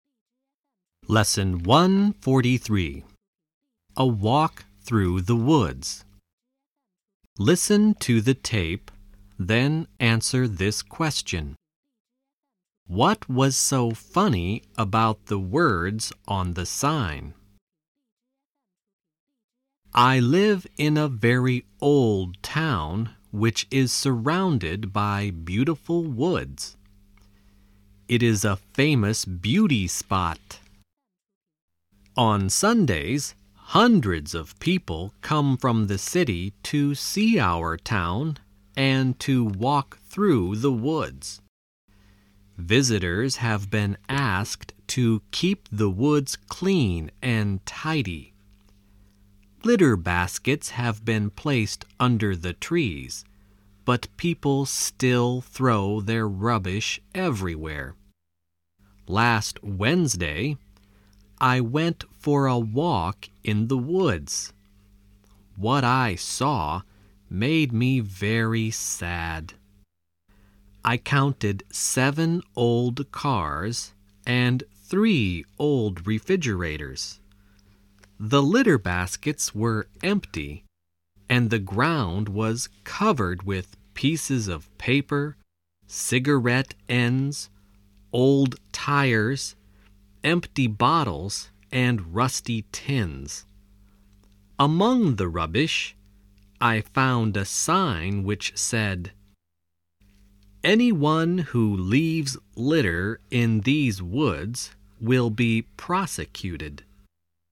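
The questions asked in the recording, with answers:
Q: What was so funny about the words on the sign?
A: The sign warning that litter-droppers would be prosecuted was itself lying among the rubbish.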